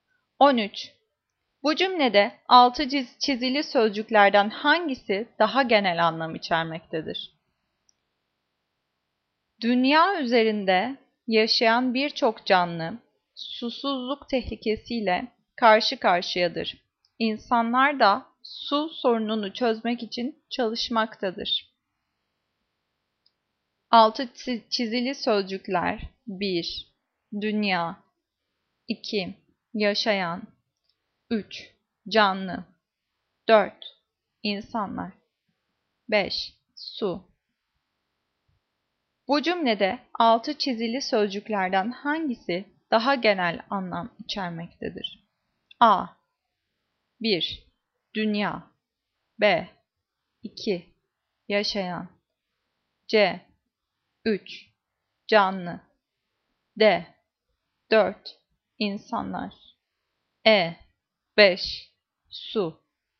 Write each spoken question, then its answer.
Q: Bu cümlede altı çizili sözcüklerden hangisi daha genel anlam içermektedir?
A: Cevap C. 3. Canlı.